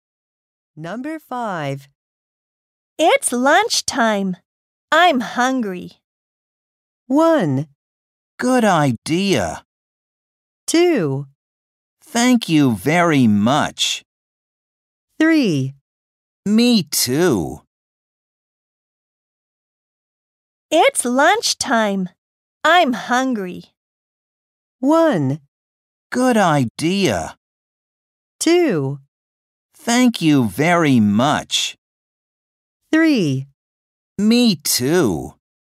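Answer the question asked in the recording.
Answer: 3: Me too.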